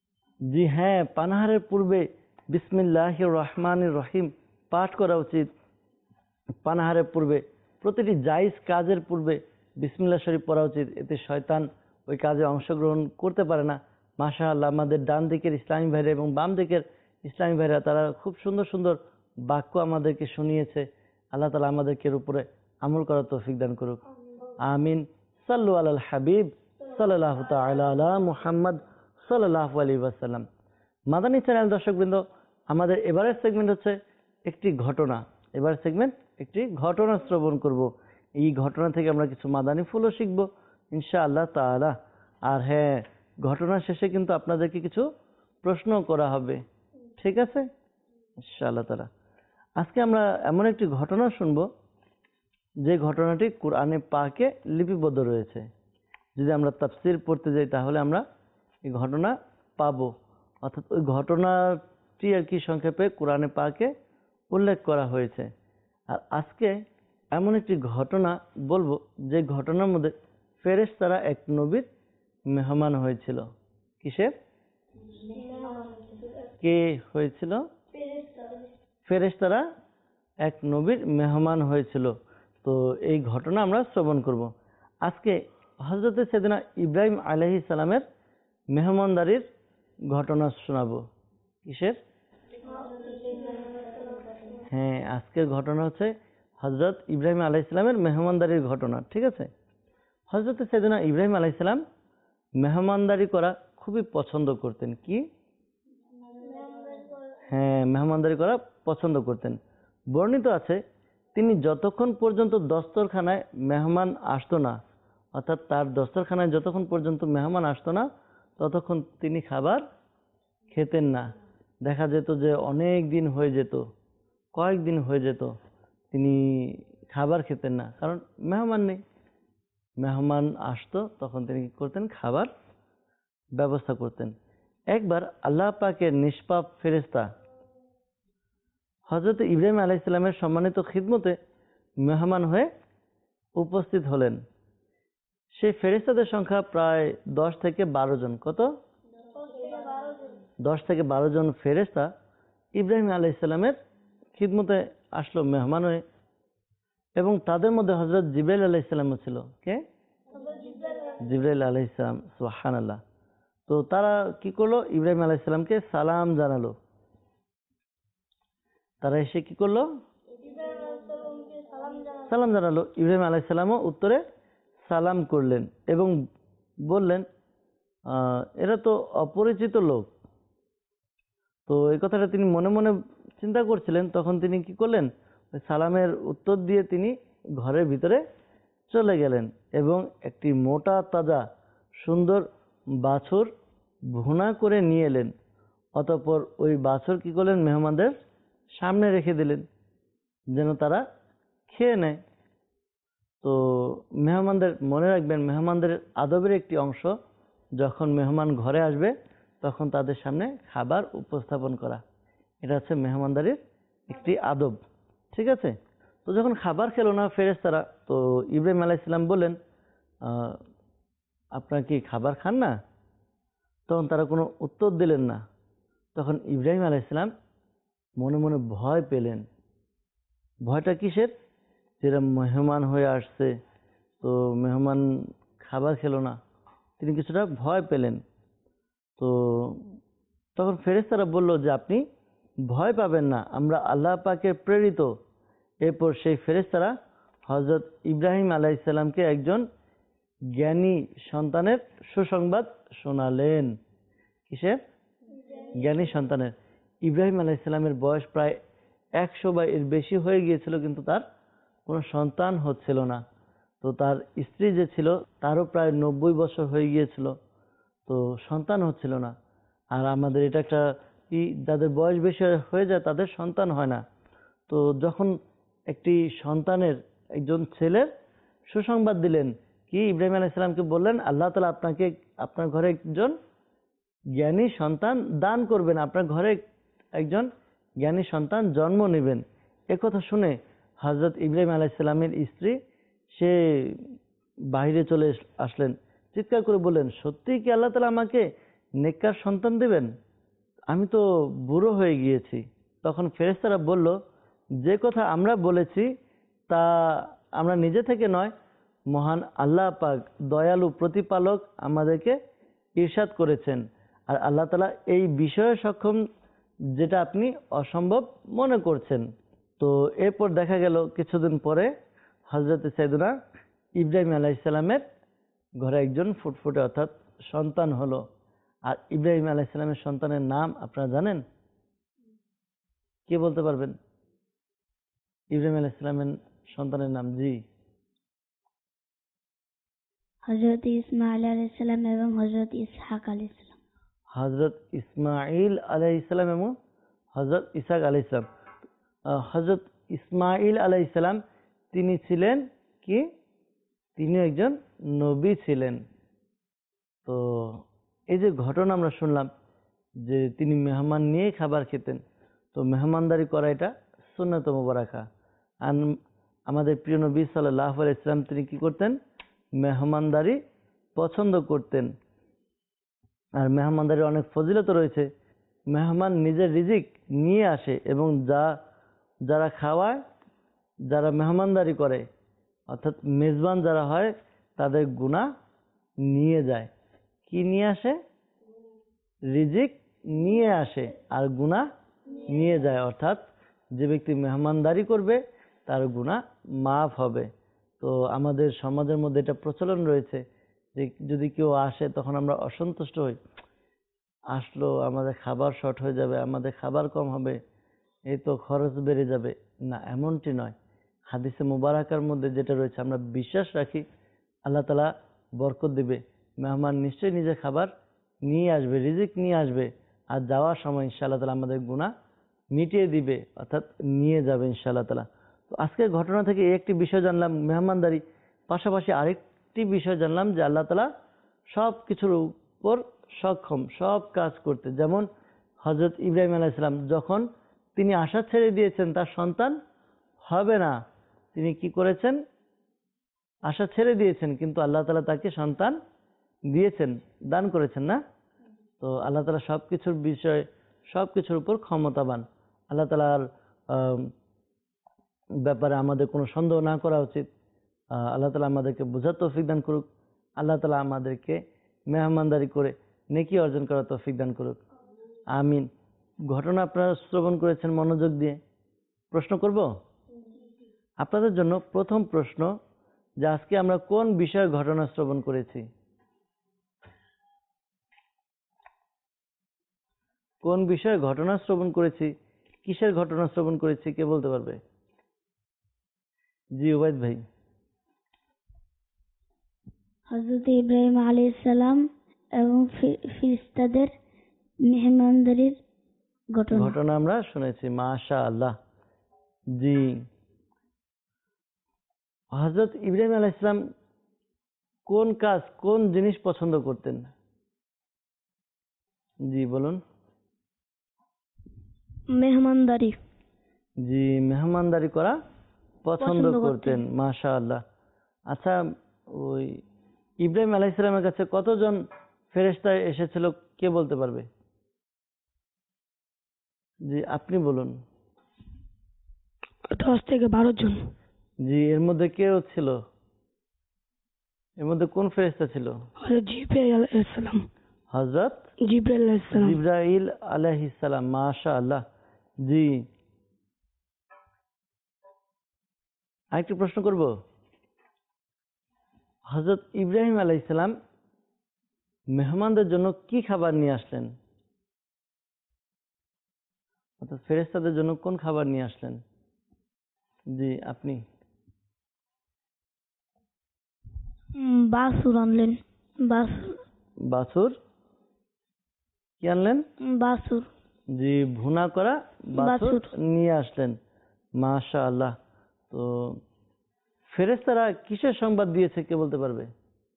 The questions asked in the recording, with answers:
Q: যে আজকে আমরা কোন বিষয়ে ঘটনা শ্রবণ করেছি,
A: হযরত ইব্রাহিম আলাইহিস সালাম এবং ফেরেশতাদের মেহমানদারির ঘটনা

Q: হযরত ইব্রাহিম আলাইহিস সালাম কোন কাজ, কোন জিনিস পছন্দ করতেন?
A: মেহমানদারি।

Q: ওই ইব্রাহিম আলাইহিসসালামের কাছে কতজন ফেরেশতা এসেছিল, কে বলতে পারবে?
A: 10 থেকে 12 জন।

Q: এর মধ্যে কোন ফেরেশতা ছিল?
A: জিব্রাইল আলাইহিসসালাম

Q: তো ফেরেশতারা কিসের সংবাদ দিয়েছে, কে বলতে পারবে?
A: একজন জ্ঞানী সন্তান হওয়ার সুসংবাদ নিয়ে এসেছে।